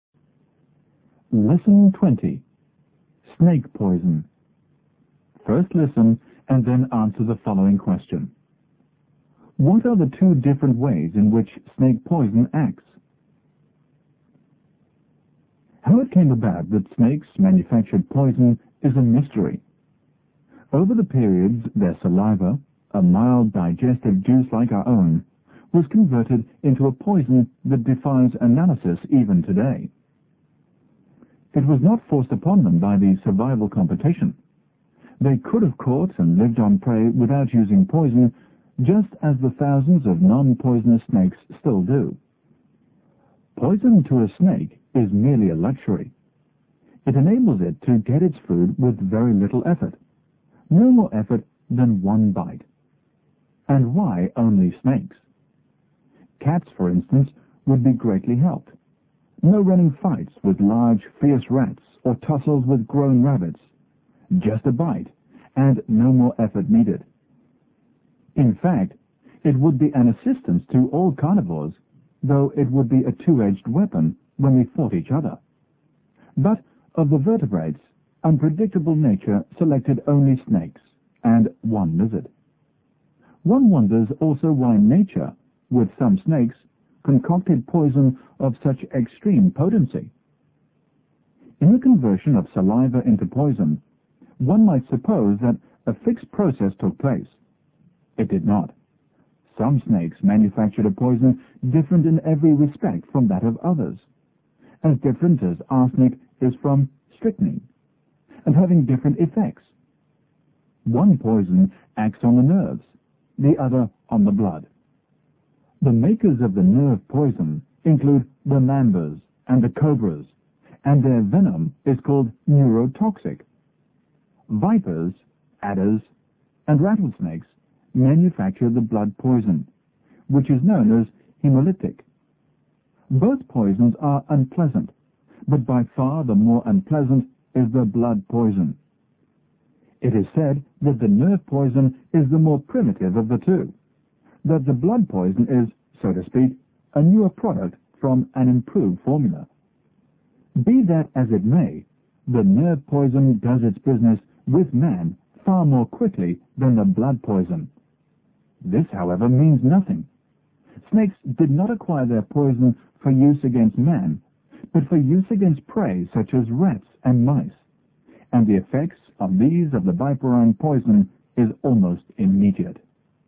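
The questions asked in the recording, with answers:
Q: What are the two different ways in which snake poison acts?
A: One poison acts on the nerves (neurotoxic), the other on the blood (hemolytic).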